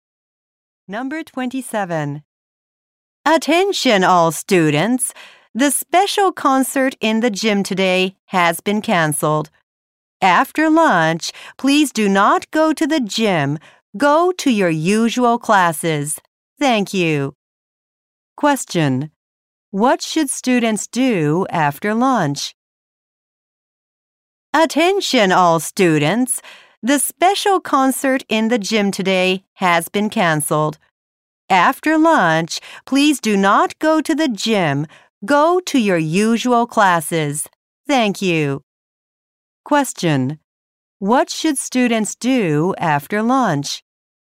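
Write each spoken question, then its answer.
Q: Question. What should students do after lunch?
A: Go to their usual classes.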